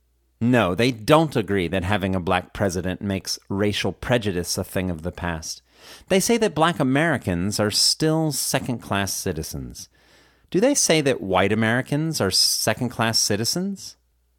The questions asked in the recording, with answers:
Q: Do they say that white Americans are second-class citizens?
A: No, they don't say that white Americans are second-class citizens.